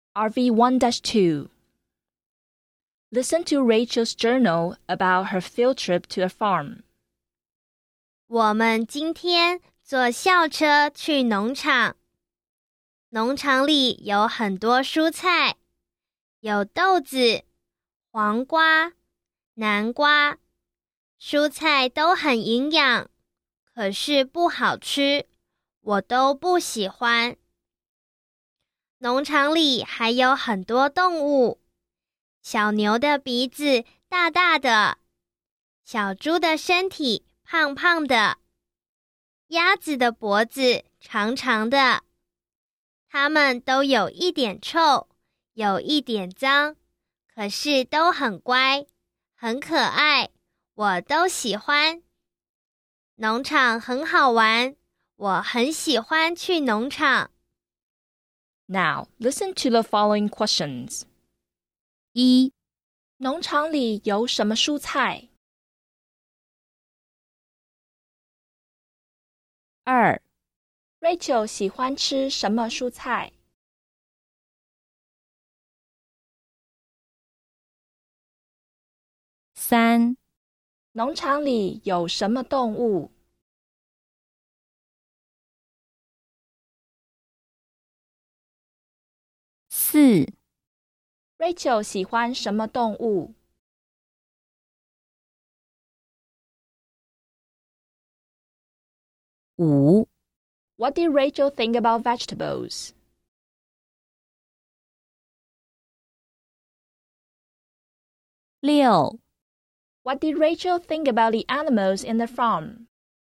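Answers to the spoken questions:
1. 豆子、黄瓜、南瓜
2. 她都不喜欢
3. 小牛、小猪、鸭子
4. 小牛、小猪、鸭子,她都喜欢
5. They are nutritious but not tasty; she doesn't like any of them.
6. They are a bit smelly and dirty, but well-behaved and cute; she likes them all.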